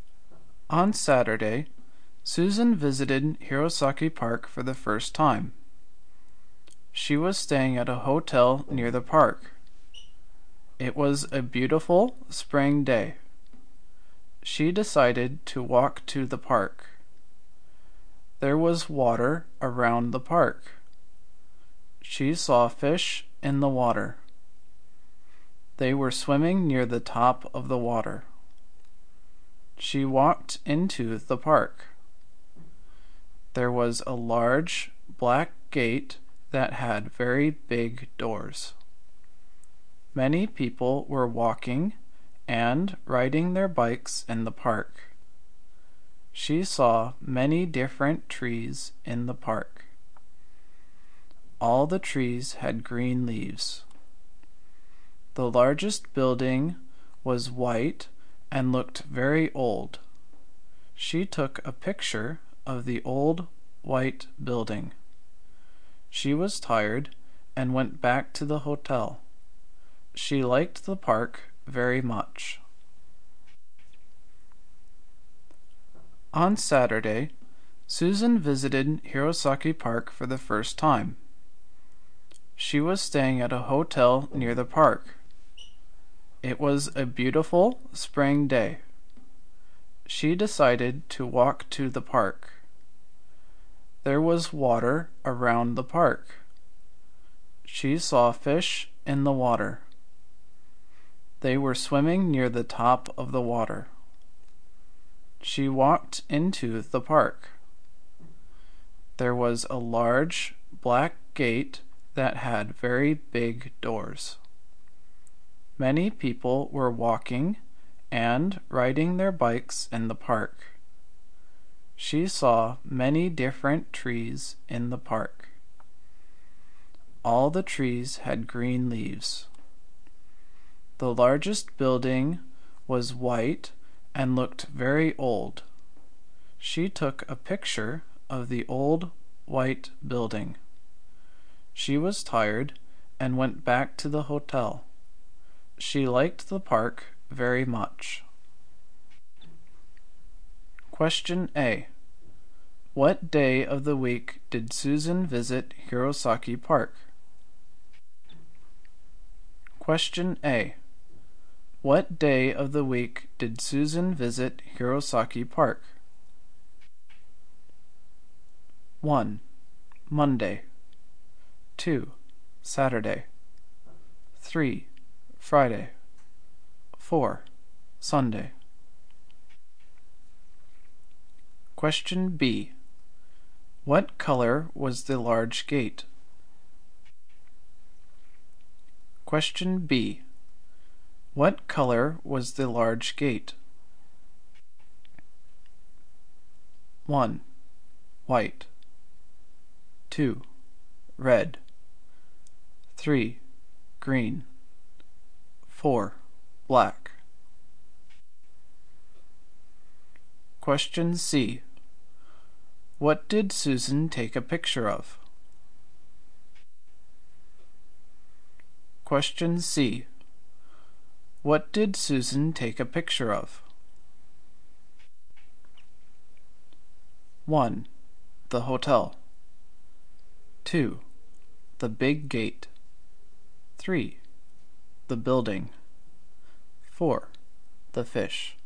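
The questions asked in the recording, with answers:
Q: Question A. What day of the week did Susan visit Hirosaki Park?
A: 2: Saturday

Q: Question B. What color was the large gate?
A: 4: Black

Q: Question C. What did Susan take a picture of?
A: 3: The building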